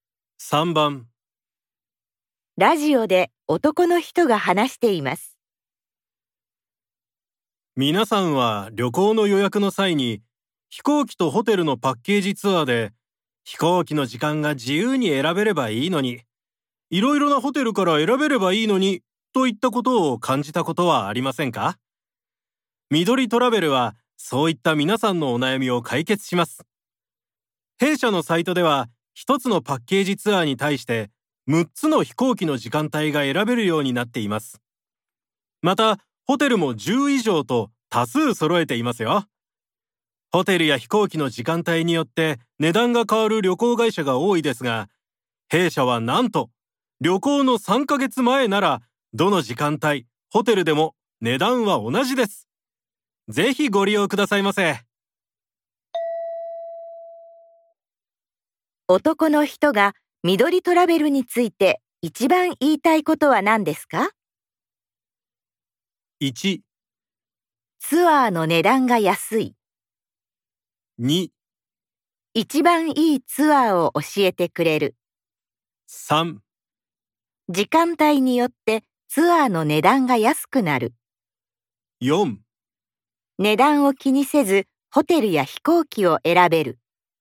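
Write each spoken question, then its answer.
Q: 男の人が緑トラベルについて一番言いたいことは何ですか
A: 4: 値段を気にせずホテルや飛行機を選べる。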